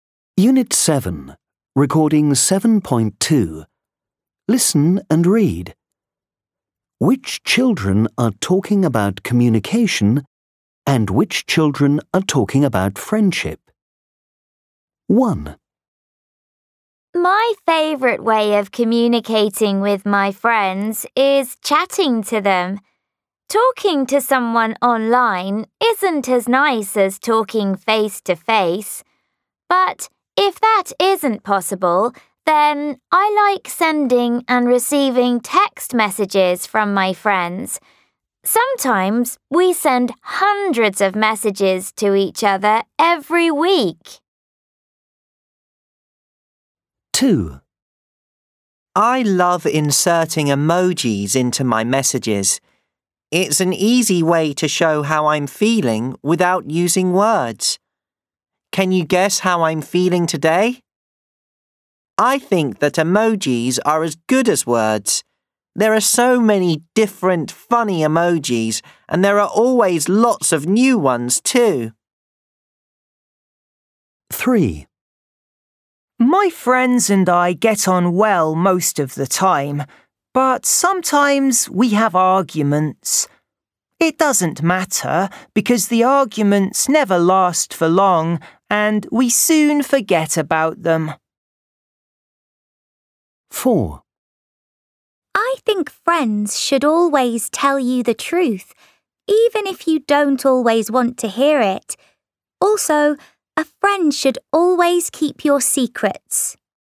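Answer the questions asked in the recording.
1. communication
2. communication
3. friendship
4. friendship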